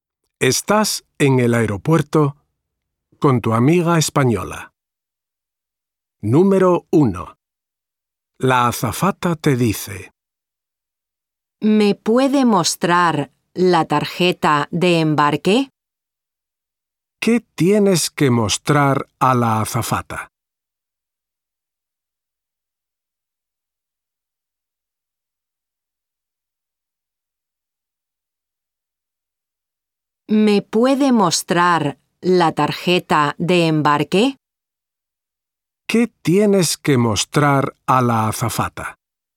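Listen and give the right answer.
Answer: la tarjeta de embarque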